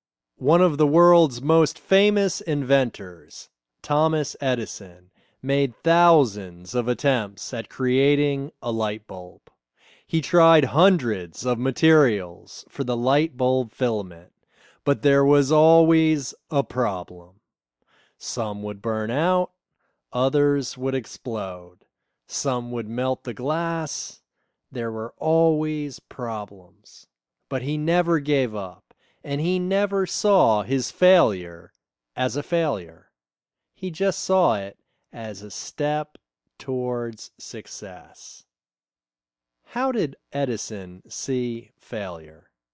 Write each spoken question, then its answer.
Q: How did Edison see failure?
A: He saw failure as a step towards success.